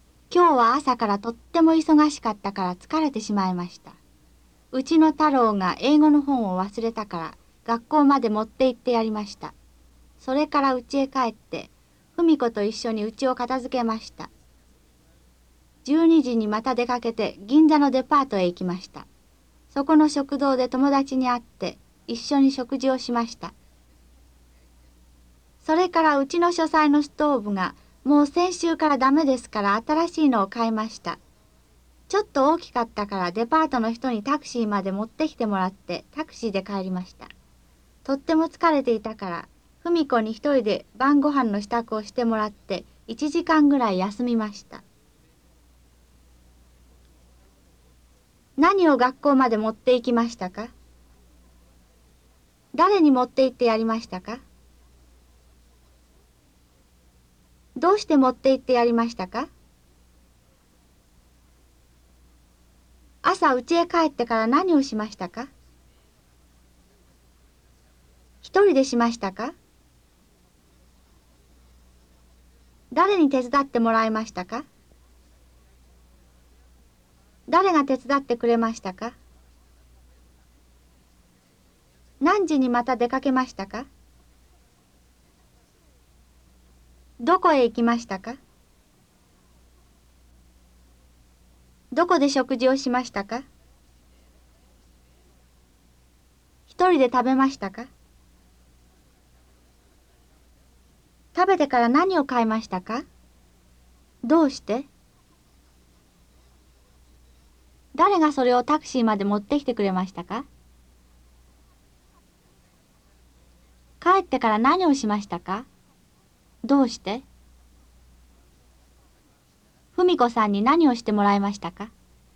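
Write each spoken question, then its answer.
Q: 何を学校まで持って行きましたか?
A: 英語の本

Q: 誰に持って行ってやりましたか?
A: 太郎

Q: どうして持って行ってやりましたか?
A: 太郎が英語の本を忘れたから

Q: 朝うちへ帰ってから何をしましたか?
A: 家を片付けました

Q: 一人でしましたか?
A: いいえ、ふみ子と一緒にしました

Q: 誰に手伝ってもらいましたか?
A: ふみ子

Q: 誰が手伝ってくれましたか?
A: ふみ子

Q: 何時にまた出かけましたか?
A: 12時

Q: どこへ行きましたか?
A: 銀座のデパート

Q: どこで食事をしましたか?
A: デパートの食堂

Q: 一人で食べましたか?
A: いいえ、友達と一緒に食べました

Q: 食べてから何を買いましたか?どうして?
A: 新しいストーブ。書斎のストーブが先週からダメだから

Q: 誰がそれをタクシーまで持ってきてくれましたか?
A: デパートの人

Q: 帰ってから何をしましたか?どうして?ふみ子さんに何をしてもらいましたか?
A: 1時間ぐらい休みました。とても疲れていたから。晩ご飯の支度をしてもらいました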